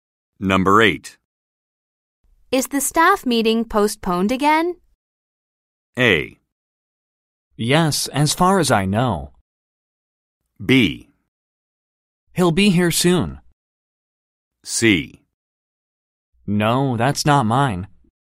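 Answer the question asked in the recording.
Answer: A: Yes, as far as I know.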